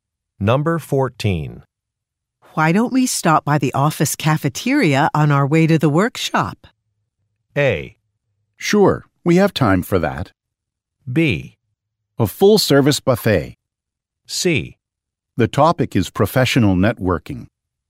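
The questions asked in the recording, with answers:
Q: Why don't we stop by the office cafeteria on our way to the workshop?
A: A: Sure, we have time for that.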